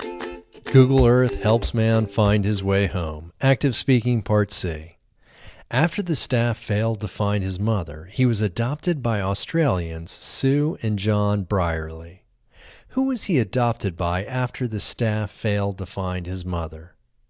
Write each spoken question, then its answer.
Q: Who was he adopted by after the staff failed to find his mother?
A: He was adopted by Australians Sue and John Brierley after the staff failed to find his mother.